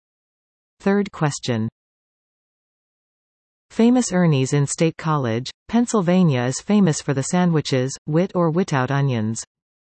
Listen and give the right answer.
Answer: Answer a cheesesteak.